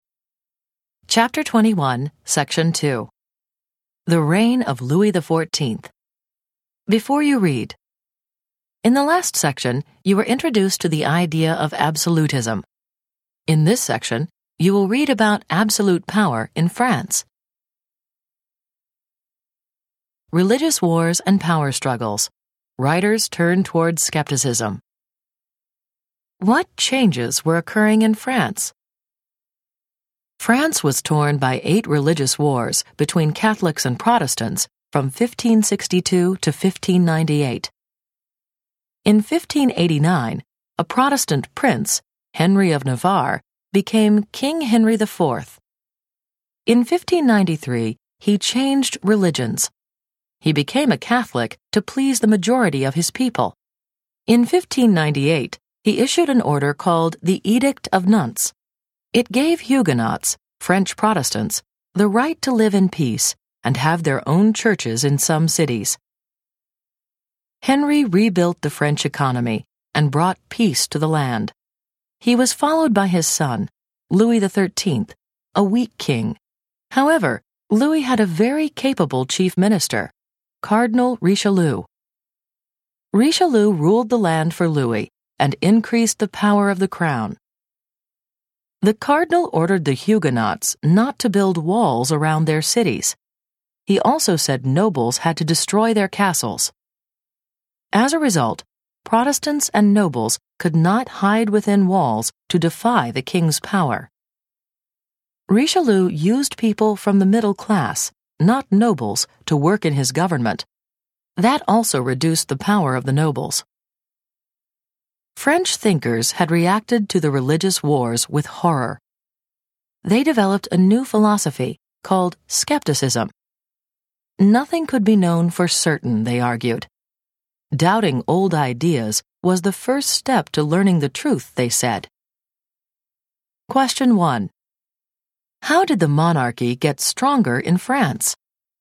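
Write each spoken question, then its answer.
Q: How did the monarchy get stronger in France?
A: Richelieu made Huguenots stop building walls around their cities and made nobles destroy their castles, and used middle-class people in government, which weakened the nobles and strengthened the crown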